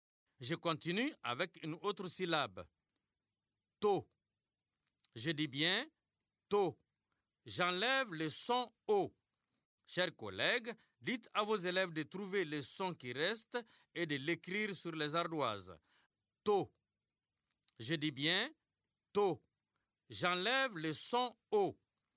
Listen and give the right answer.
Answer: C'est le son T.